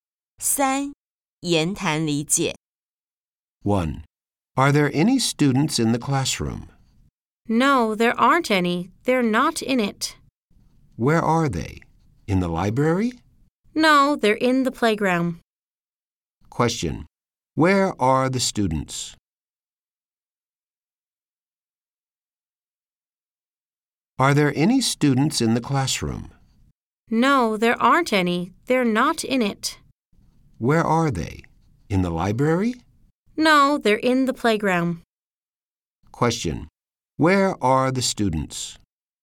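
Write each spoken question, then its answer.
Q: Question. Where are the students?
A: In the playground.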